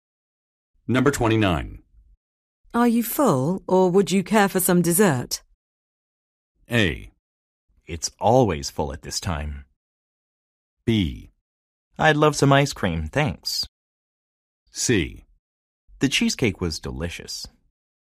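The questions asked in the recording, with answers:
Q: Are you full, or would you care for some dessert?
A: B: I'd love some ice cream, thanks.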